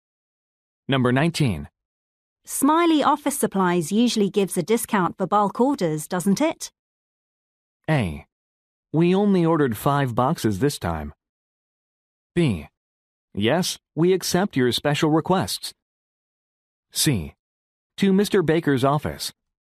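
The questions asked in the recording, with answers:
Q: Smiley Office Supplies usually gives a discount for bulk orders, doesn't it?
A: A: We only ordered 5 boxes this time.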